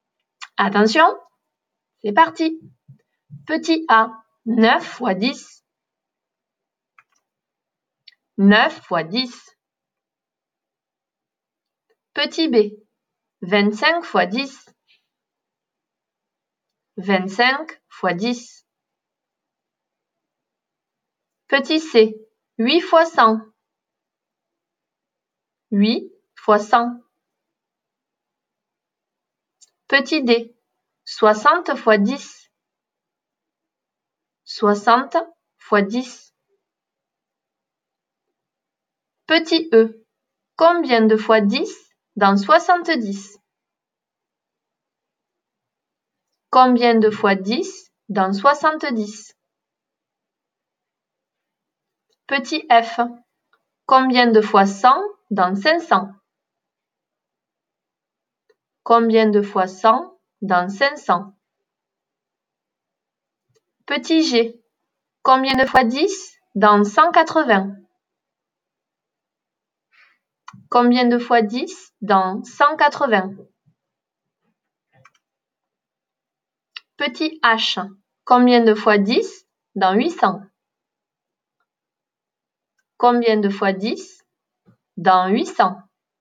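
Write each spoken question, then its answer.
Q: Petit a, 9 fois 10.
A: 90

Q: Petit b, 25 fois 10.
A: 250

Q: Petit c, 8 fois 100.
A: 800

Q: Petit d, 60 fois 10.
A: 600

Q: Petit g, combien de fois 10 dans 180?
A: 18

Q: Petit h, combien de fois 10 dans 800?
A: 80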